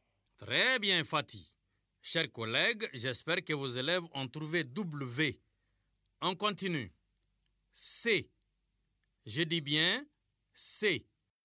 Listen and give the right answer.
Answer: Monsieur, la lettre qui vient avant C, c'est B.